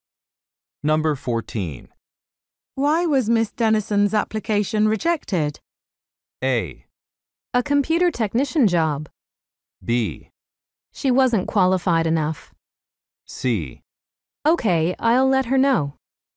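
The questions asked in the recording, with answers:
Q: Why was Miss Dennison's application rejected?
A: B: She wasn't qualified enough.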